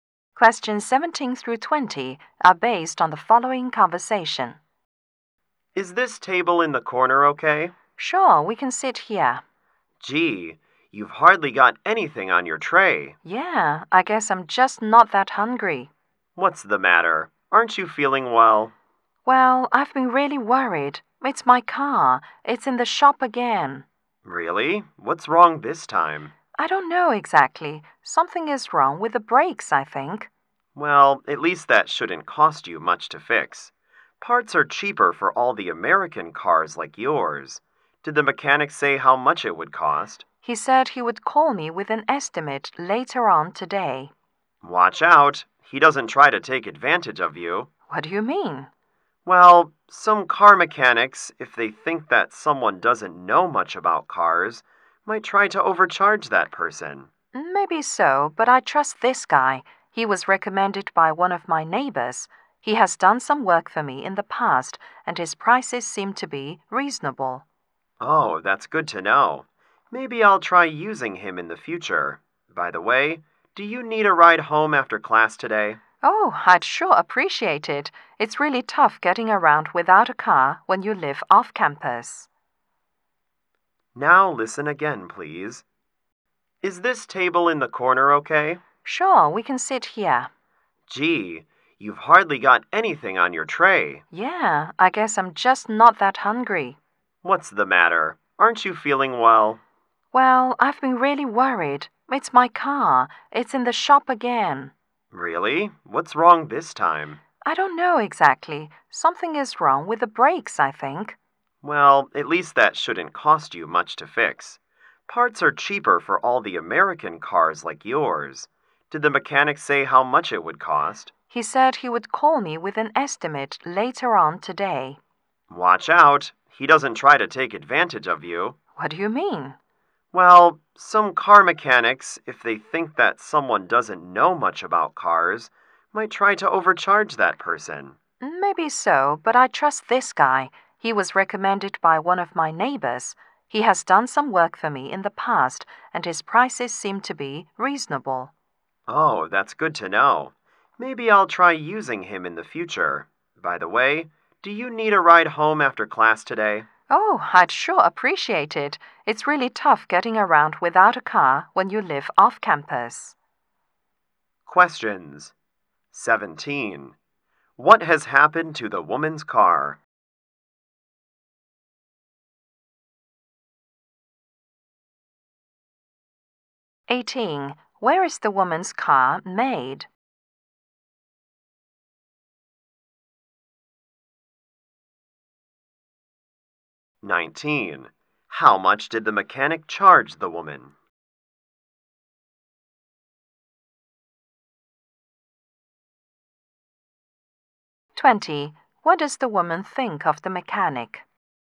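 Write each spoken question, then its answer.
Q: What has happened to the woman's car?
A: Something is wrong with its brakes

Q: Where is the woman's car made?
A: In America

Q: What does the woman think of the mechanic?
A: He is trustworthy and his prices are reasonable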